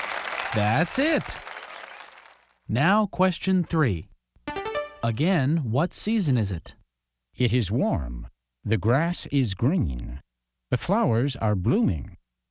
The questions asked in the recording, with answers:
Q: What season is it?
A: That's easy. It's spring.